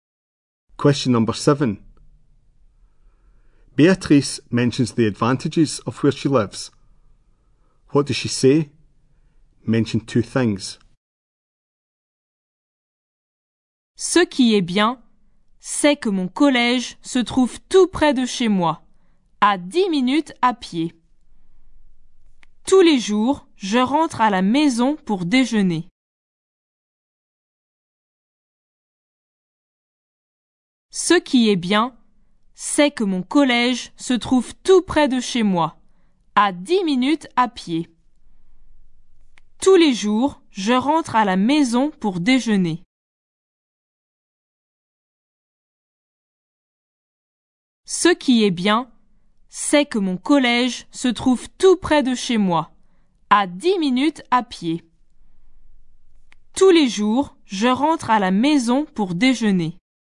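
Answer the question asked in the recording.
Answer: Her school is very close, 10 minutes' walk; she goes home for lunch every day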